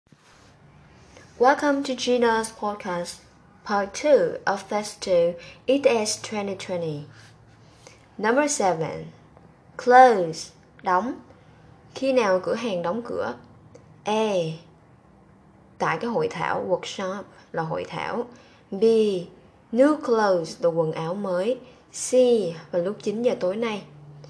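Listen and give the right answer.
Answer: C: Vào lúc 9 giờ tối nay.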